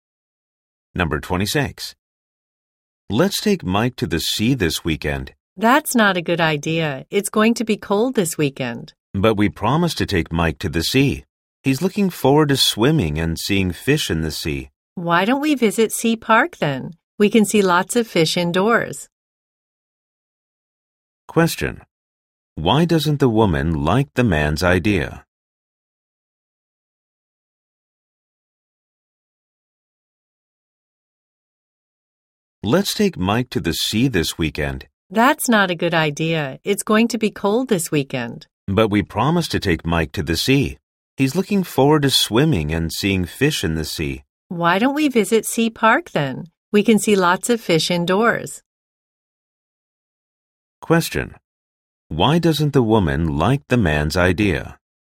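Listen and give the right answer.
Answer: It's going to be cold this weekend.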